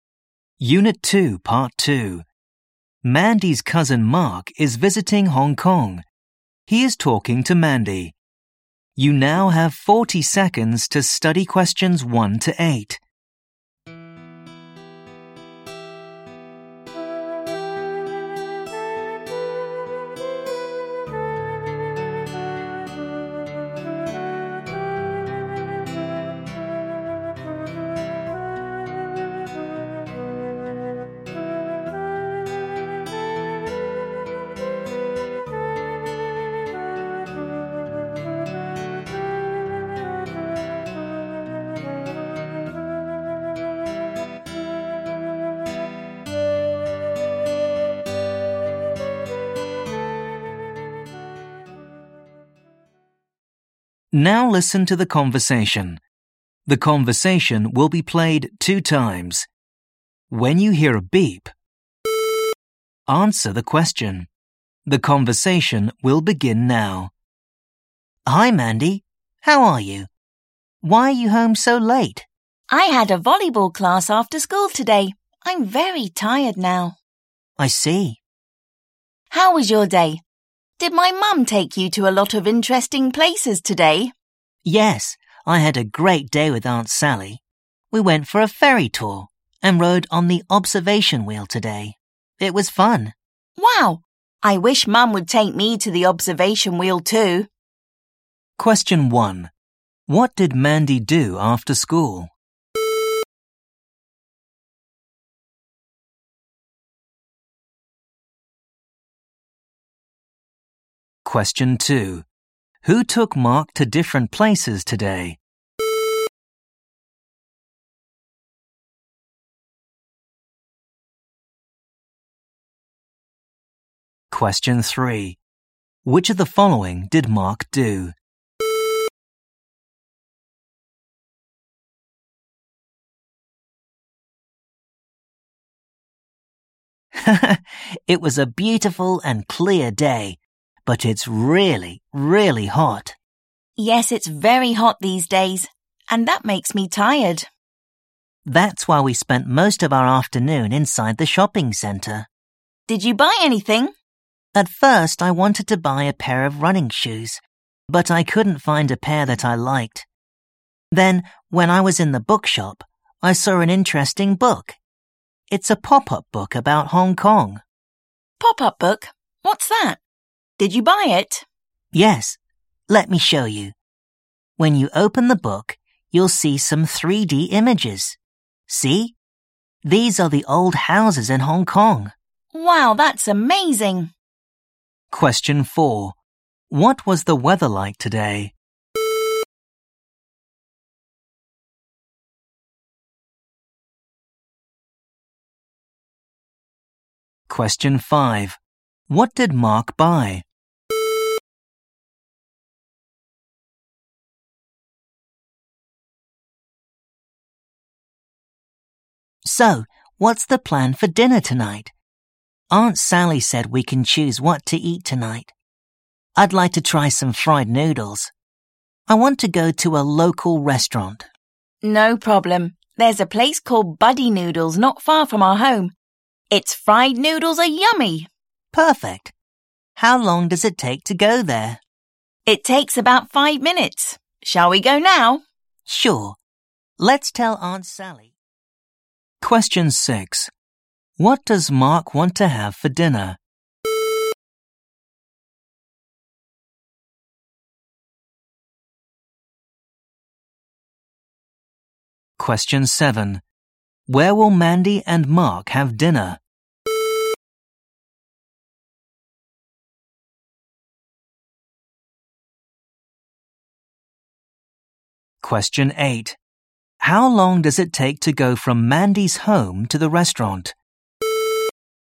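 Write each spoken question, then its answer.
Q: What did Mandy do after school?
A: She had a volleyball class.

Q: Who took Mark to different places today?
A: Aunt Sally (Mandy's mum)

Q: What was the weather like today?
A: Clear but very hot

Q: What did Mark buy?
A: A pop-up book about Hong Kong

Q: What does Mark want to have for dinner?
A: Fried noodles

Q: Where will Mandy and Mark have dinner?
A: At Buddy Noodles, a local restaurant

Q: How long does it take to go from Mandy's home to the restaurant?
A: About 5 minutes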